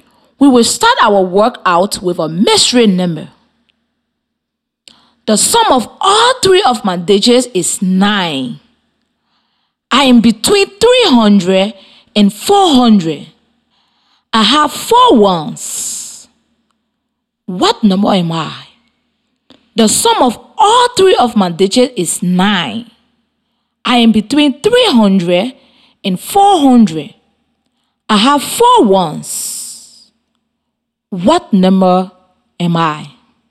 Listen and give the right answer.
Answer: I think the answer is 324.